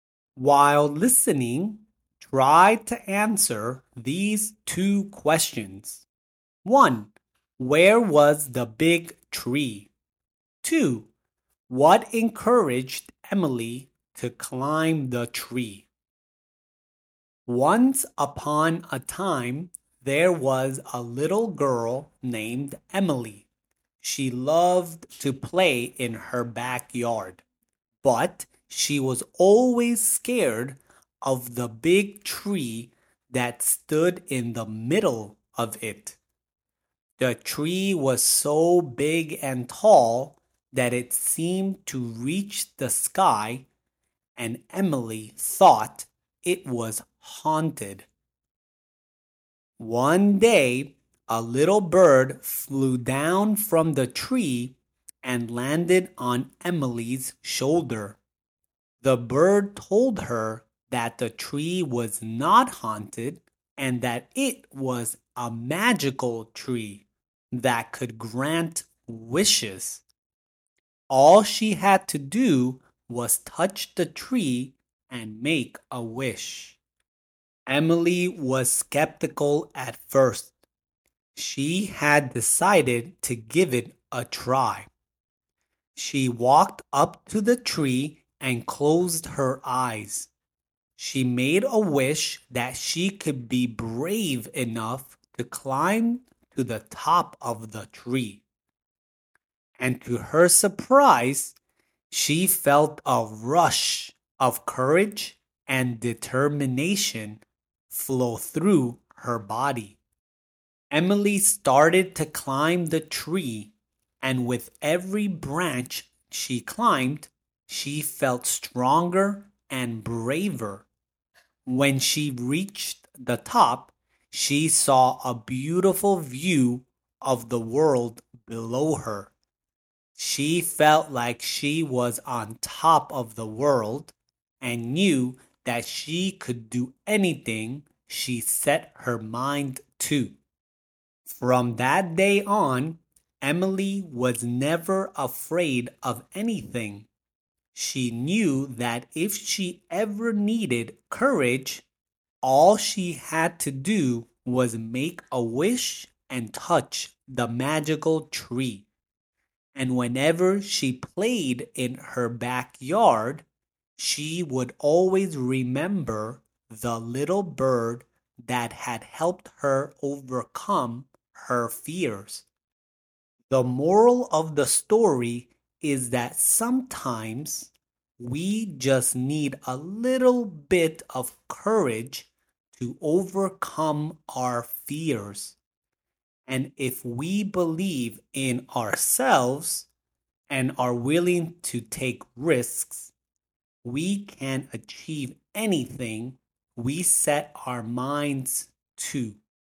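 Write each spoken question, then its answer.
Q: Where was the big tree?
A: In the middle of Emily's backyard

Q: What encouraged Emily to climb the tree?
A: A little bird told her it was a magical tree that grants wishes; she wished to be brave and felt a rush of courage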